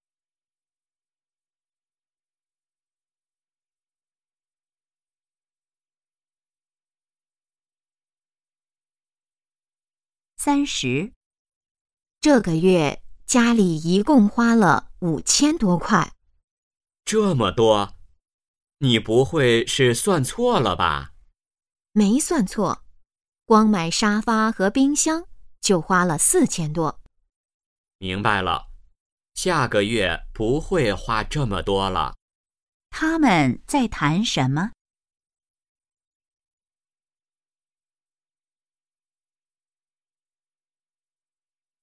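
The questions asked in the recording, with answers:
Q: 他们在谈什么?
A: 这个月家里花的钱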